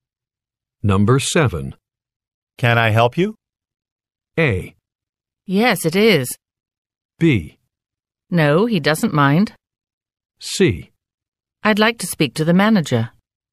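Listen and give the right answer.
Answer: C: I'd like to speak to the manager.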